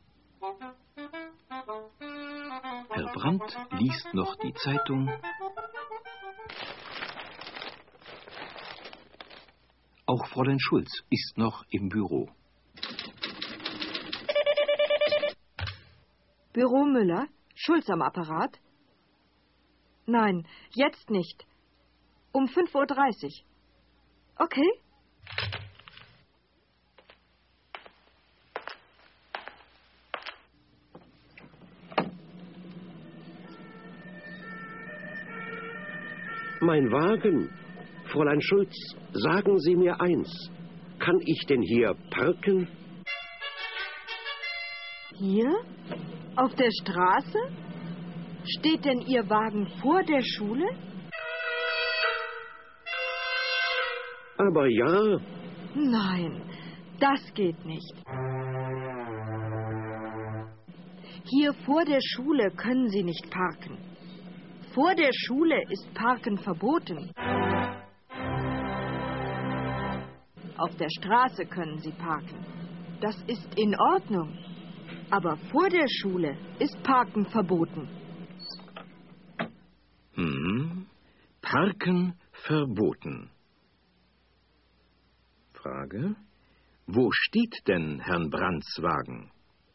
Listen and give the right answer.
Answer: Sein Wagen steht vor der Schule.